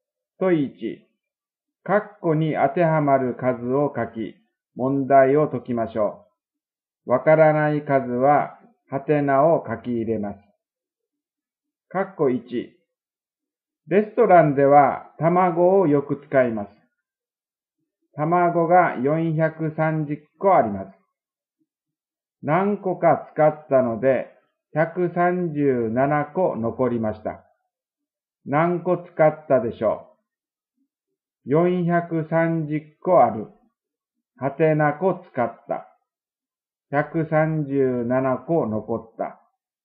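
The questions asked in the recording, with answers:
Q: 何個使ったでしょう?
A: 293個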